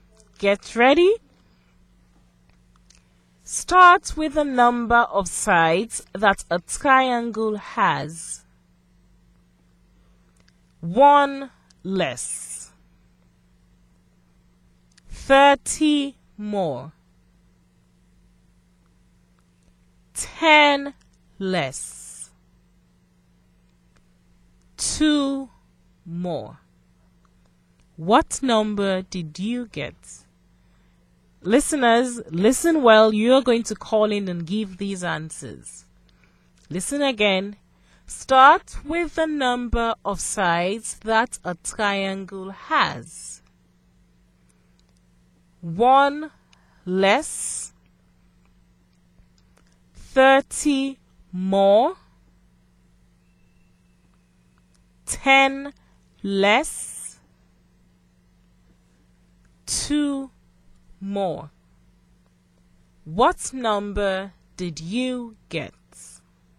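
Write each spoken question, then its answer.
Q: What number did you get?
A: 24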